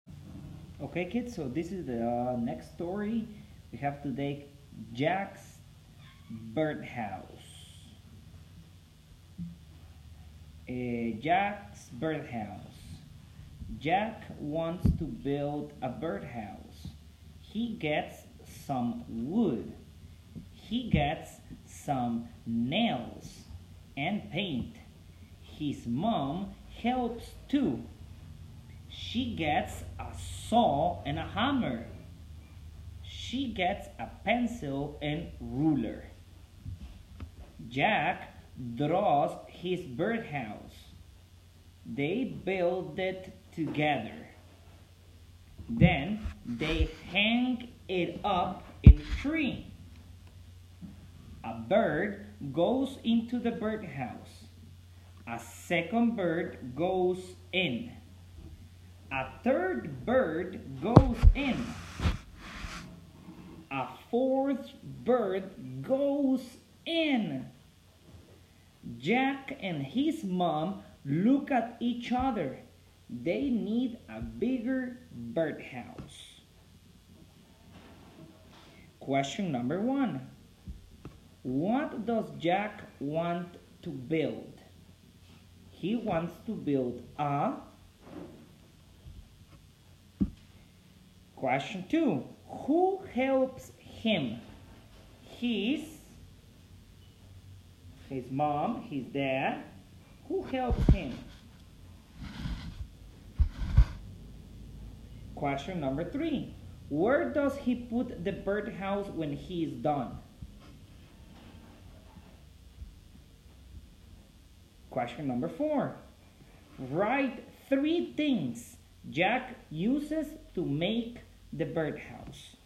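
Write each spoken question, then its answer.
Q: What does Jack want to build?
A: A birdhouse

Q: who helps him?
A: His mom

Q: where does he put the birdhouse when he is done?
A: In a tree

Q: write three things Jack uses to make the birdhouse.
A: Wood, nails and paint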